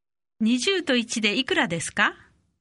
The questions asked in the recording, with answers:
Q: 20と1でいくらですか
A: 21